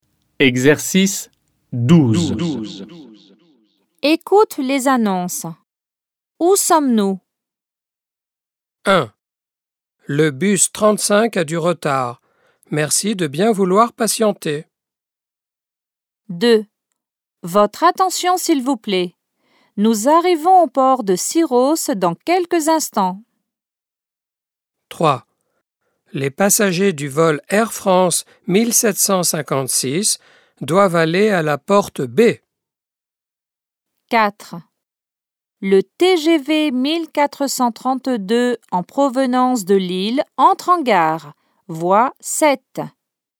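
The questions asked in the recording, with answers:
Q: Où sommes-nous?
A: À un arrêt de bus

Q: Où sommes-nous?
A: Sur un bateau

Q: Où sommes-nous?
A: À l'aéroport

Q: Où sommes-nous?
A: À la gare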